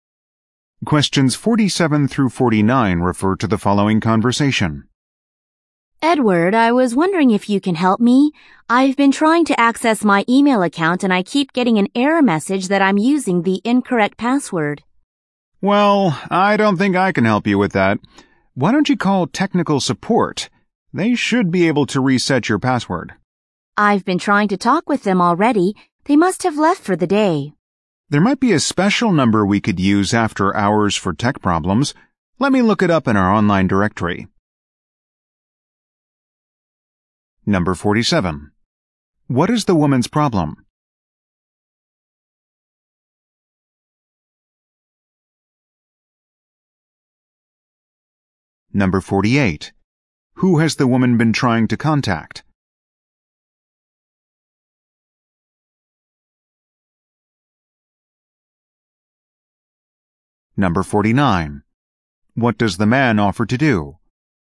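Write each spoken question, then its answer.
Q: What is the woman's problem?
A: She cannot access her email account

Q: Who has the woman been trying to contact?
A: Technical support

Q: What does the man offer to do?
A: Look up an after-hours number in the online directory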